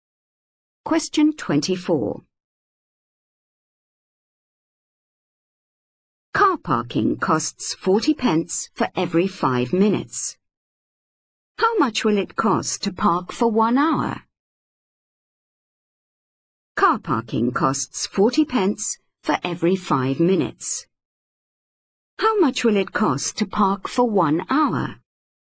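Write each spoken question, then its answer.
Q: How much will it cost to park for 1 hour?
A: £4.80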